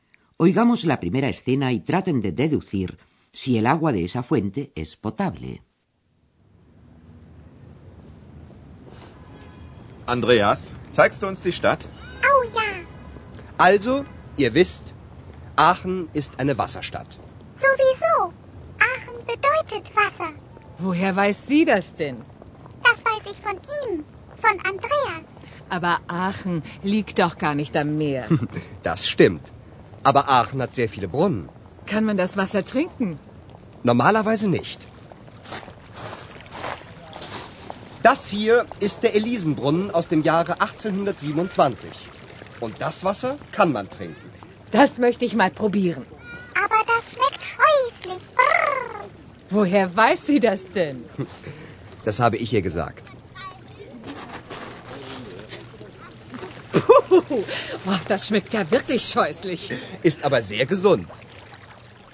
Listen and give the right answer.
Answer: hay una fuente, la fuente de Elisa, cuya agua sí que se puede beber